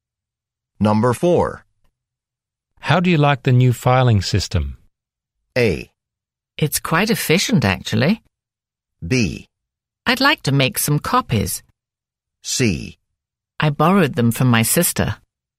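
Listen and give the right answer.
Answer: A: It's quite efficient, actually.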